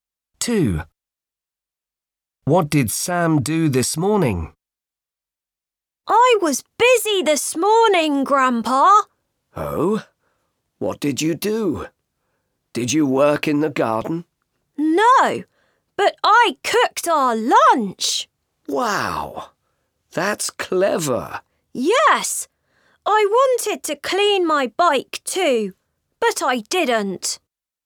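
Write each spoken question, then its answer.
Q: What did Sam do this morning?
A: He cooked lunch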